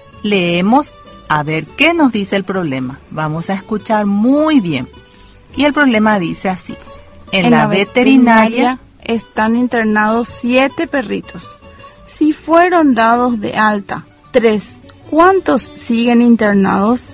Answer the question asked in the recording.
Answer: Siguen internados 4 perritos en la veterinaria